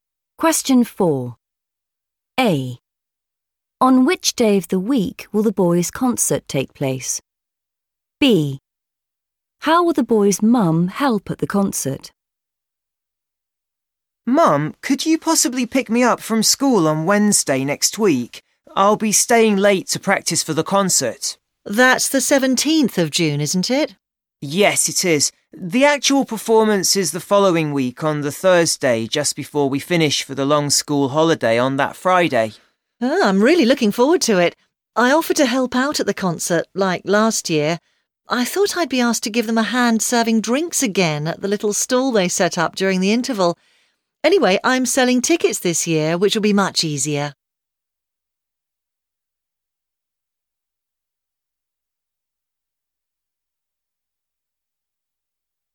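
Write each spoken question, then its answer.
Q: On which day of the week will the boys' concert take place?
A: Thursday

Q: How will the boys' mum help at the concert?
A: selling tickets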